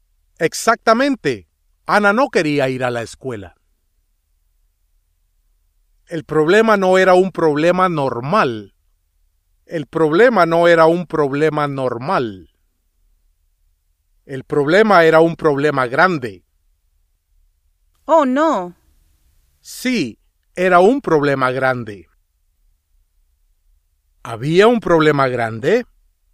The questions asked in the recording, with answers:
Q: ¿Había un problema grande?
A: Sí.